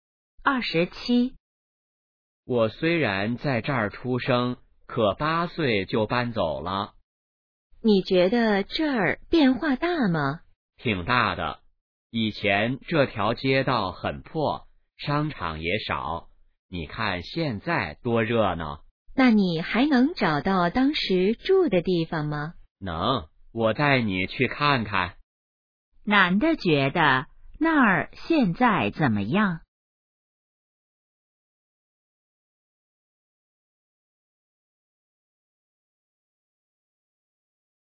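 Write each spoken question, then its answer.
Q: 男的觉得那儿现在怎么样?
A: 很热闹,变化大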